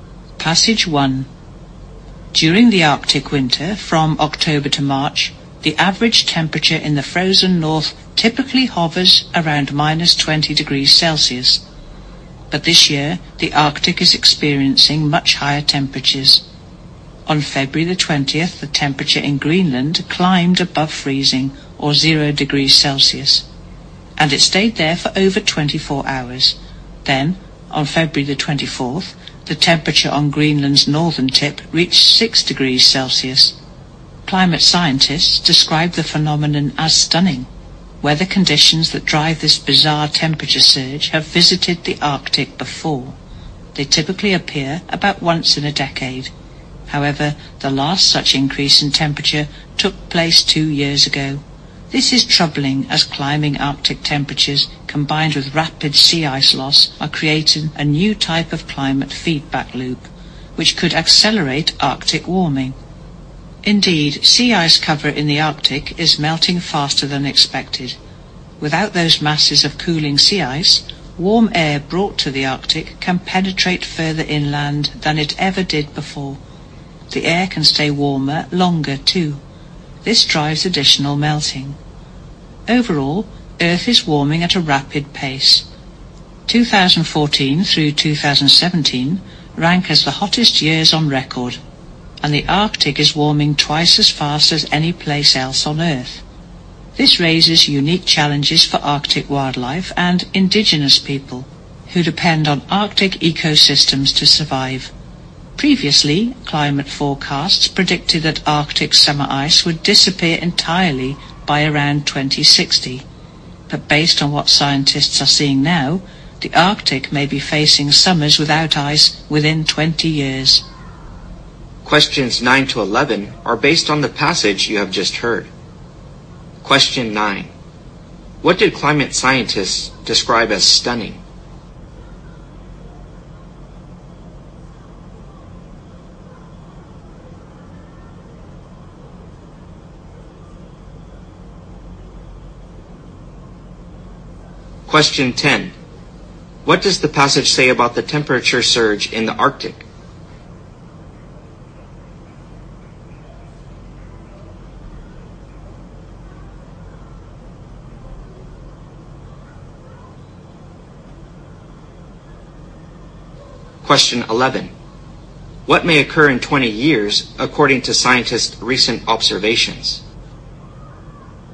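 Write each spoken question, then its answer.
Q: What did climate scientists describe as stunning?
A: The unusually high Arctic winter temperatures

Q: What may occur in 20 years according to scientists' recent observations?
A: Arctic summers without ice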